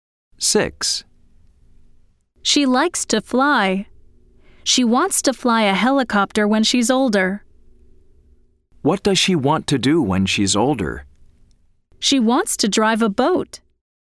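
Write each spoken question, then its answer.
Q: What does she want to do when she's older?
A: False: She wants to fly a helicopter.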